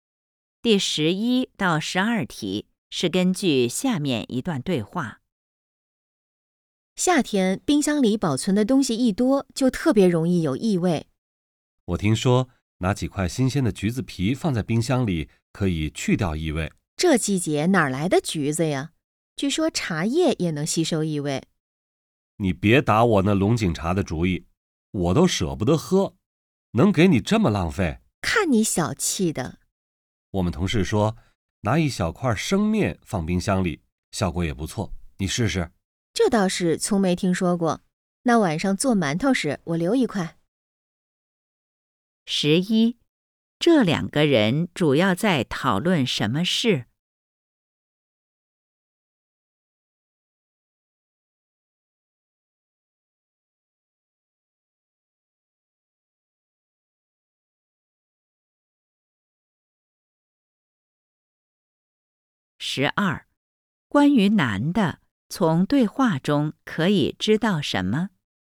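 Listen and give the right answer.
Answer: 怎么去掉冰箱里的异味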